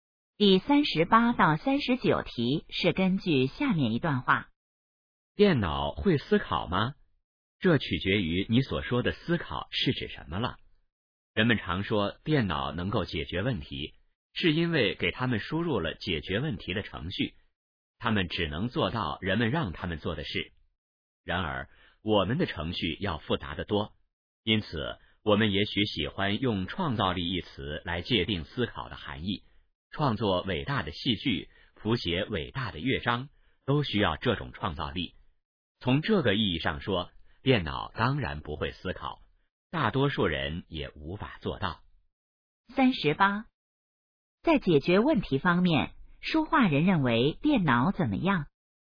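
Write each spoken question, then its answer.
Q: 在解决问题方面,说话人认为电脑怎么样?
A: 只能做人们让它们做的事

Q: 这段话主要谈什么?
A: 电脑会不会思考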